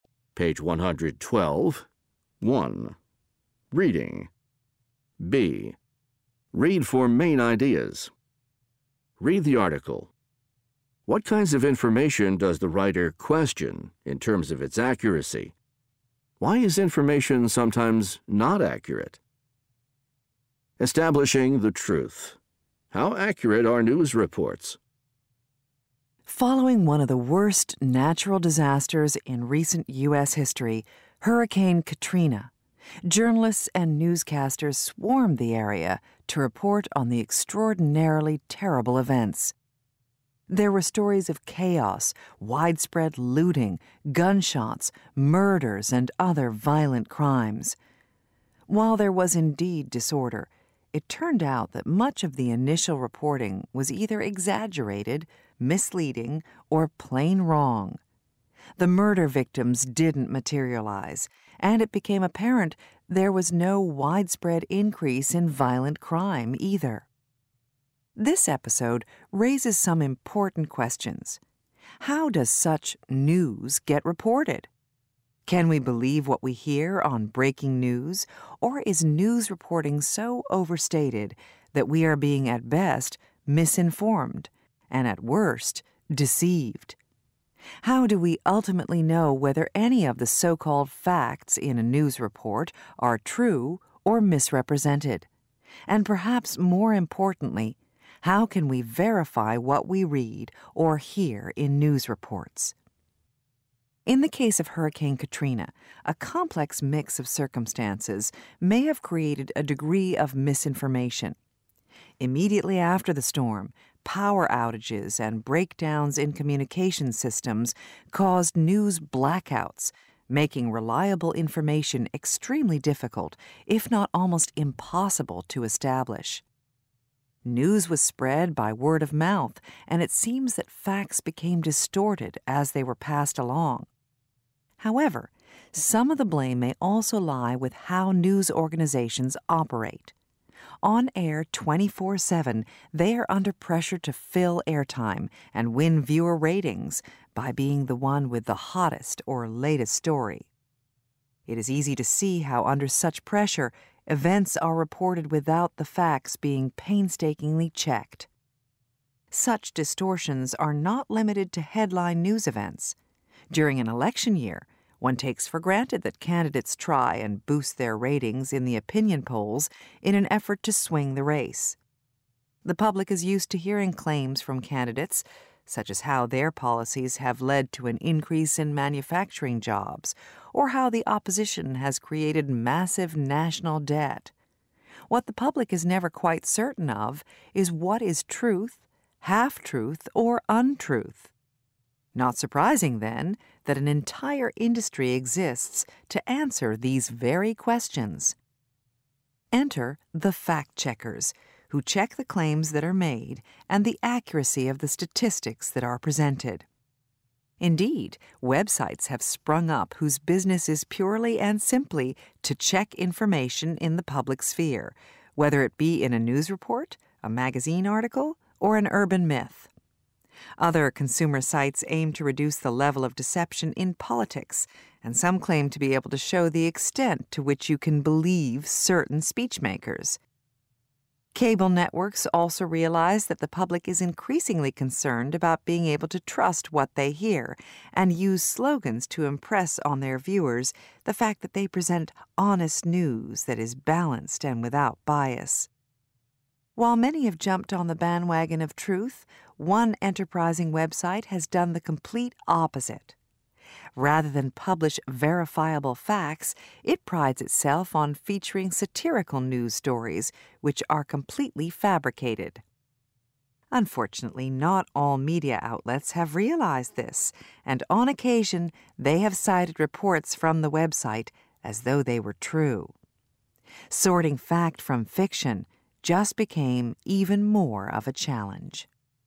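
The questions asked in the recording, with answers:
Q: What kinds of information does the writer question in terms of its accuracy?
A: News reports (e.g. breaking news on Hurricane Katrina) and claims made by election candidates

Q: Why is information sometimes not accurate?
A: Communication breakdowns and word of mouth distort facts, news organizations rush stories to fill airtime and win ratings without checking facts, and candidates exaggerate claims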